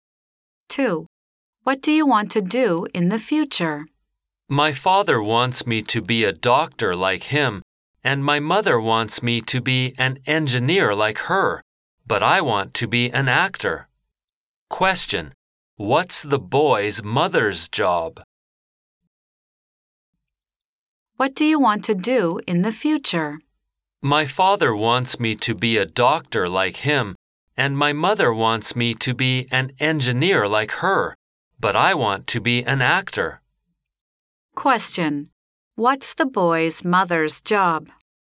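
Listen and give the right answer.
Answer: An engineer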